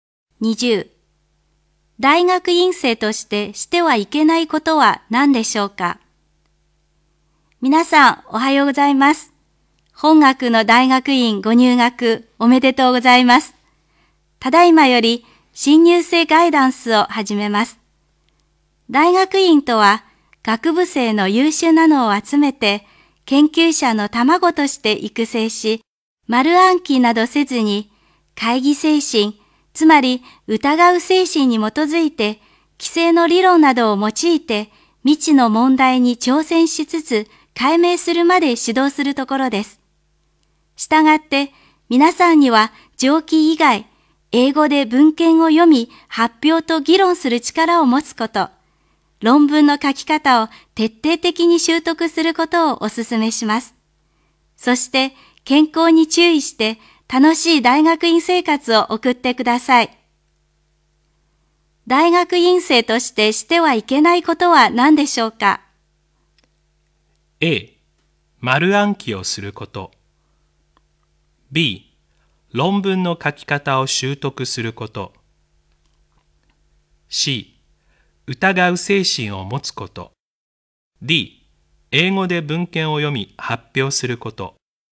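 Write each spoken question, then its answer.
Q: 大学院生としてしてはいけないことは何でしょうか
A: A: 丸暗記をすること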